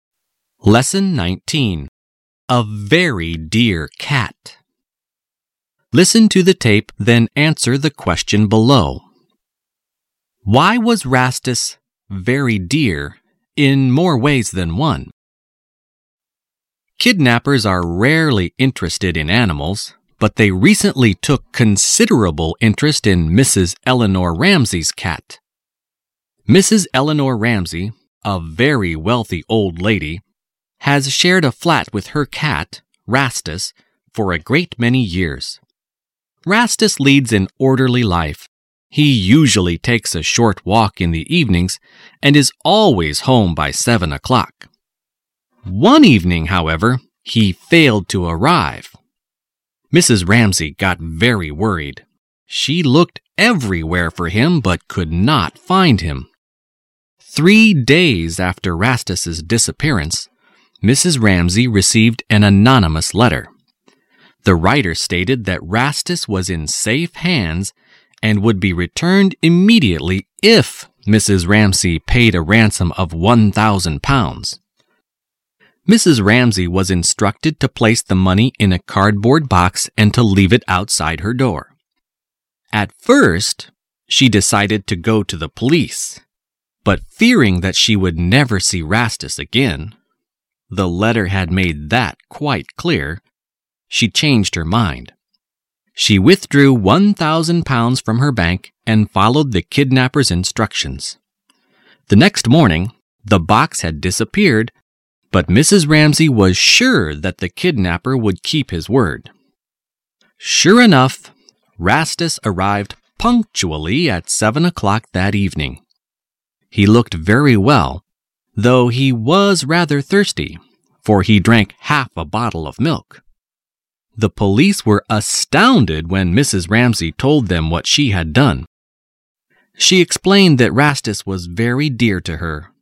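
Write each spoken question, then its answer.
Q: Why was Rastus very dear in more ways than one?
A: Mrs. Ramsey loved him very much, and she paid a ransom of £1,000 to get him back.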